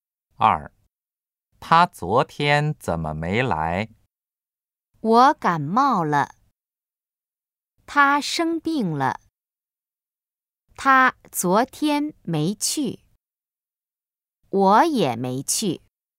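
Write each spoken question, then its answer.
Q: 他昨天怎么没来?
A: B: 他生病了。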